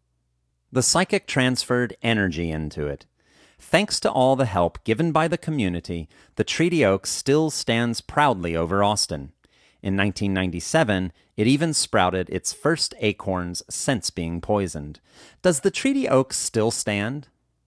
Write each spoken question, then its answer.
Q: Does the Treaty Oaks still stand?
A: Yes, the Treaty Oaks still stands.